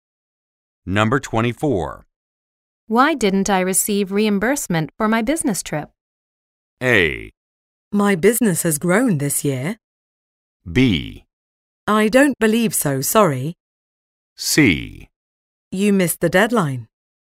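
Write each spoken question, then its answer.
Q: Why didn't I receive reimbursement for my business trip?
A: C: You missed the deadline.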